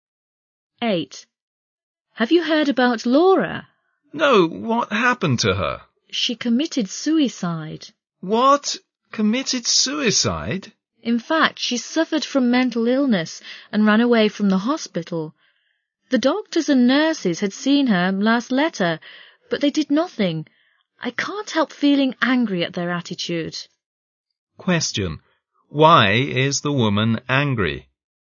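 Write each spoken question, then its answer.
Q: Why is the woman angry?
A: Because the doctors and nurses saw Laura's last letter but did nothing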